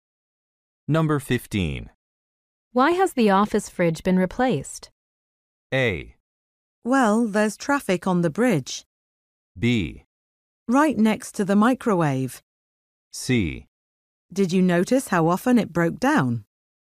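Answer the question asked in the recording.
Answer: C: Did you notice how often it broke down?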